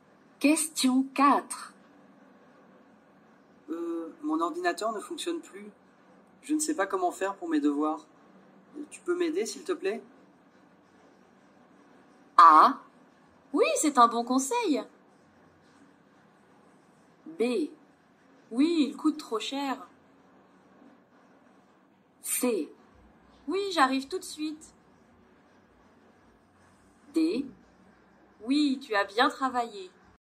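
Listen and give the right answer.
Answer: C: Oui, j'arrive tout de suite.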